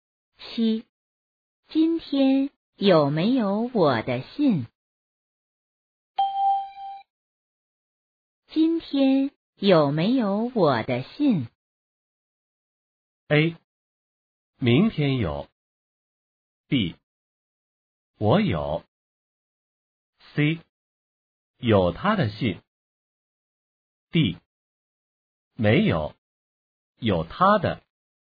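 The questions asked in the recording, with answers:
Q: 今天有没有我的信?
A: D: 没有,有他的。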